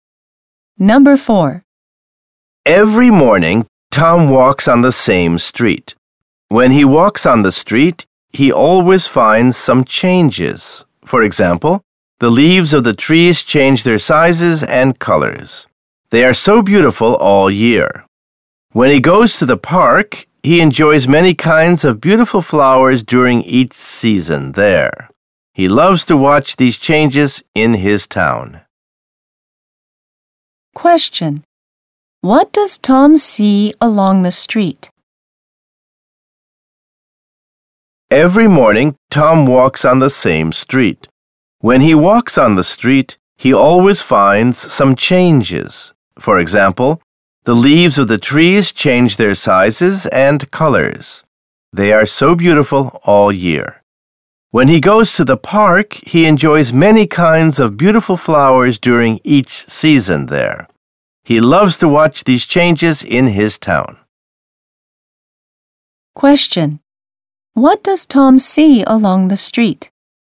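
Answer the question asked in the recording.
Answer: Trees whose leaves change size and color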